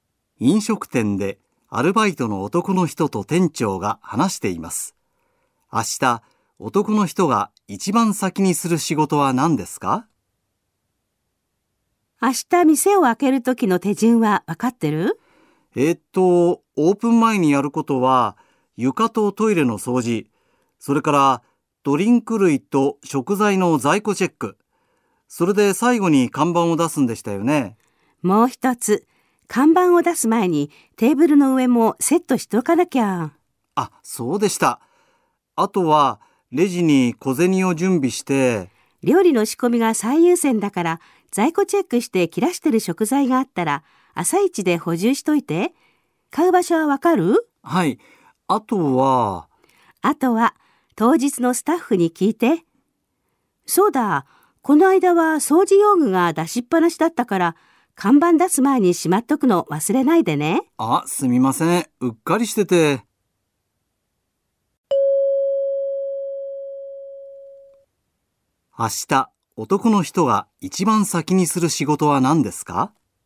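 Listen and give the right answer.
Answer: 食材の在庫チェック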